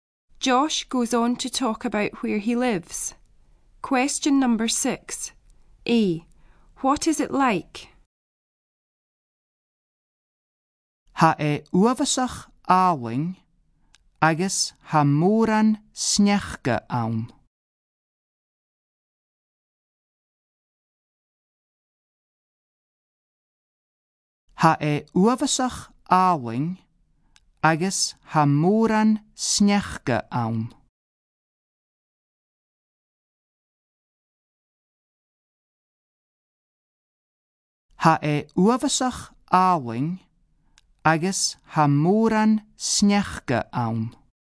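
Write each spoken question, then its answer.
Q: What is it like?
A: Very beautiful, with lots of snow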